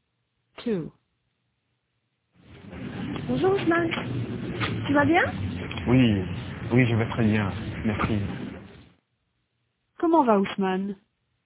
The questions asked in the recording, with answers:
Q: Comment va Ousmane?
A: Il va bien.